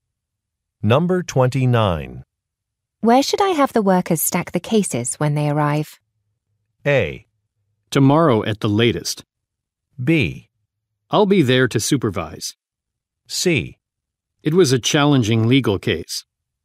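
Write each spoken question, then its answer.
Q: Where should I have the workers stack the cases when they arrive?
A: B: I'll be there to supervise.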